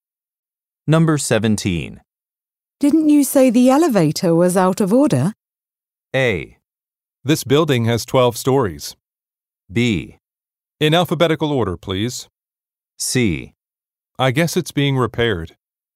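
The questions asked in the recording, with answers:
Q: Didn't you say the elevator was out of order?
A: C: I guess it's being repaired.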